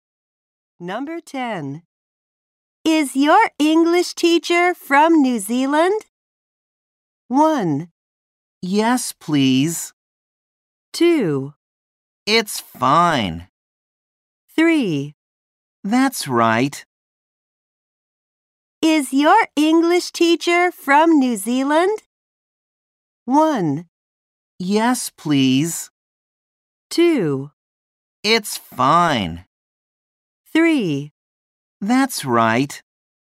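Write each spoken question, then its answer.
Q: Is your English teacher from New Zealand?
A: 3: That's right.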